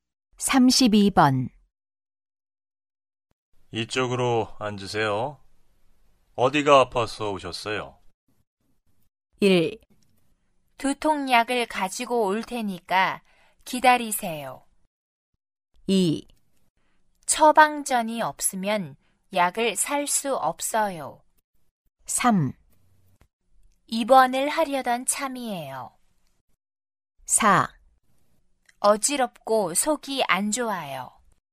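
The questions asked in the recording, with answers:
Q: 이쪽으로 앉으세요. 어디가 아파서 오셨어요?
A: 4: 어지럽고 속이 안 좋아요.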